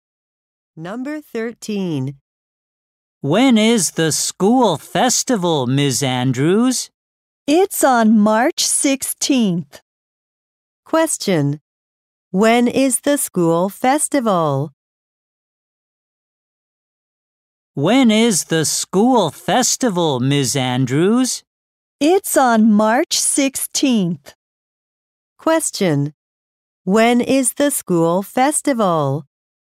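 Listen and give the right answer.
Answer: On March 16th.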